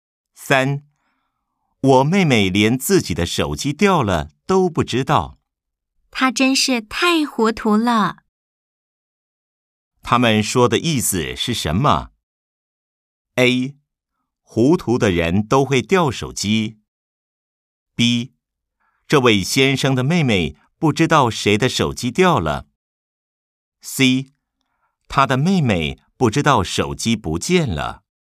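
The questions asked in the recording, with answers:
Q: 他们说的意思是什么?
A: C: 他的妹妹不知道手机不见了。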